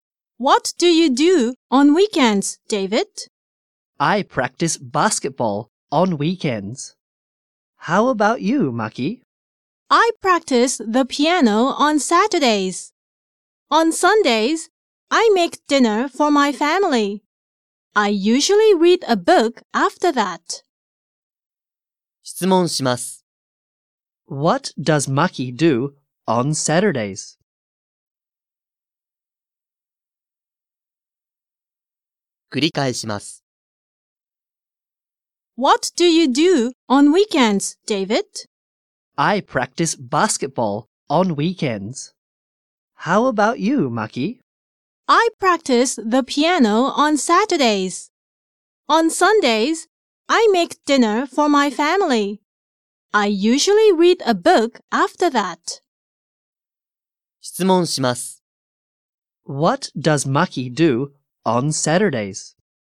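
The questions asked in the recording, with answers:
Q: What does Maki do on Saturdays?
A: She practices the piano.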